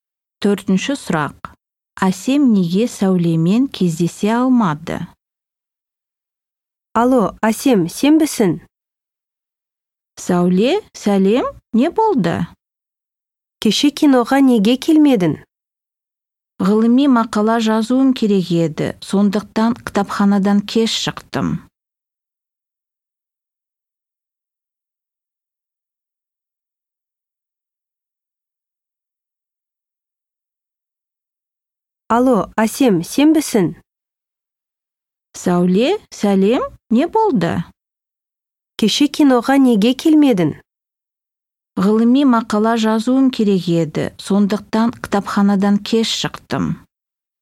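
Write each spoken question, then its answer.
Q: Әсем неге Сәулемен кездесе алмады?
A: Ғылыми мақала жазып, кітапханадан кеш шықты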